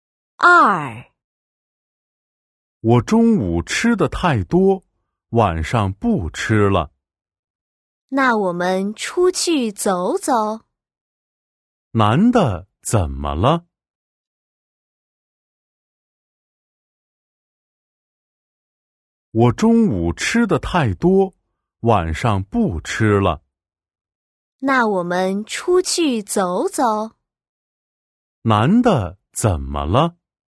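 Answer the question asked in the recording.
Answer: 中午吃得太多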